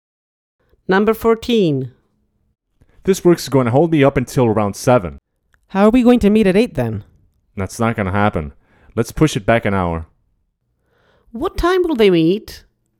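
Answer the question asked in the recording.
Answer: at 9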